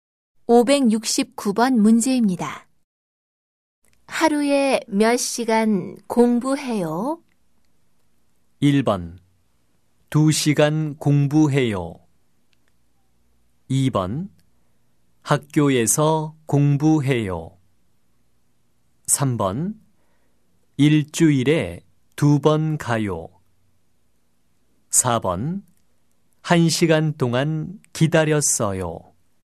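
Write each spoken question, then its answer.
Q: 하루에 몇 시간 공부해요?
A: 1: 2시간 공부해요.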